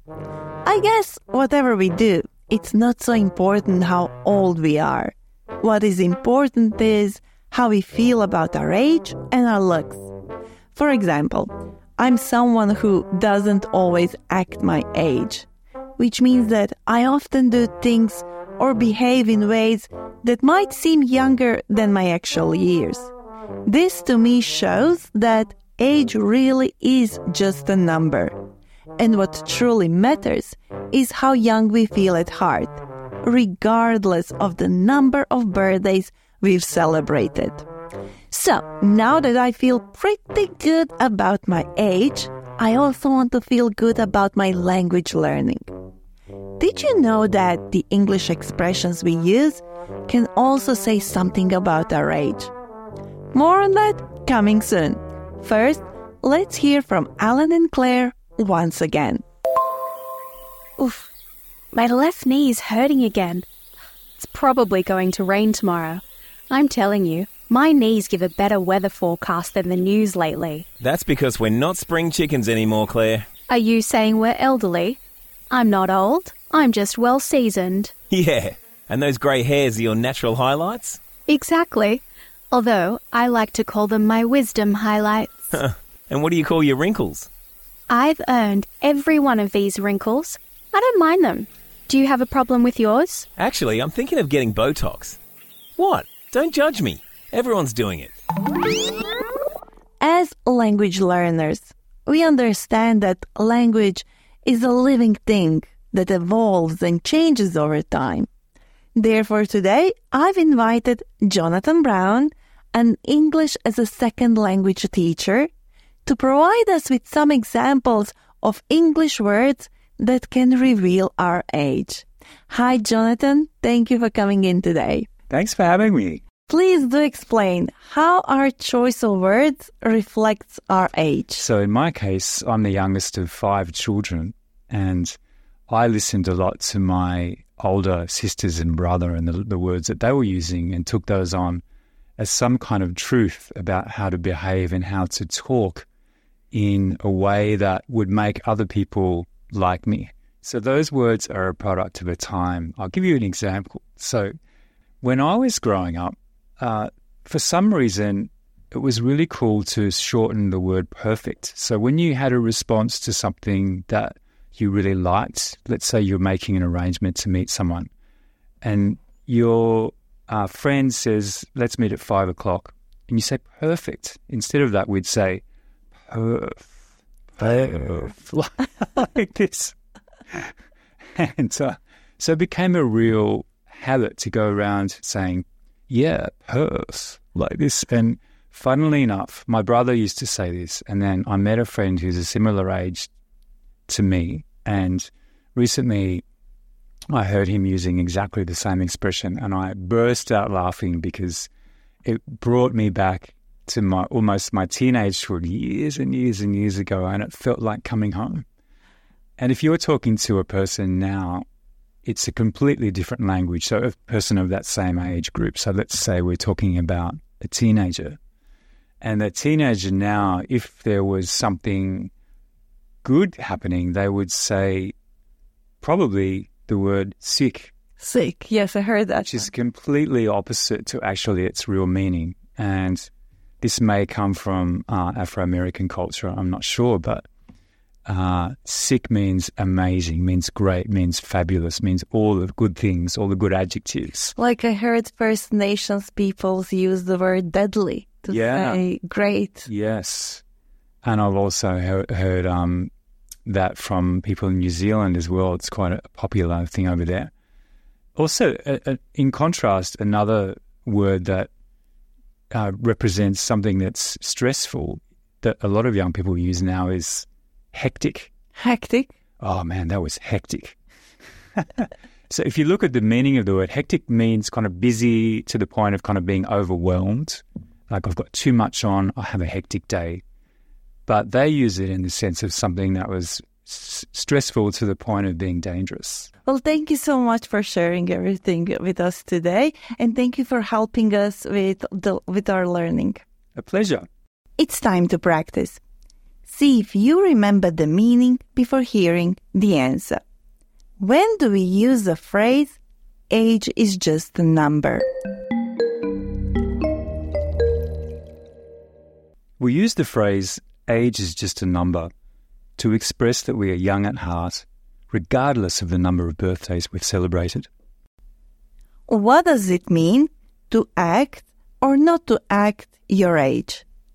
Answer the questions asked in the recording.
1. We use the phrase, age is just a number, to express that we are young at heart, regardless of the number of birthdays we've celebrated.
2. To act your age means to behave in ways expected for someone your age, while not acting your age means behaving in a manner not normally associated with your age.